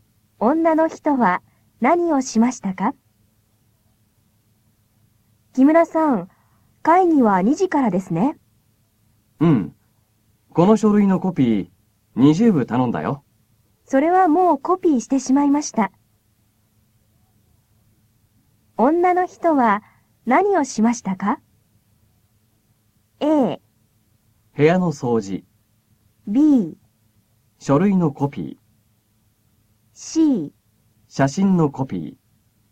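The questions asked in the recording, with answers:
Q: 女の人は何をしましたか?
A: B: 書類のコピー。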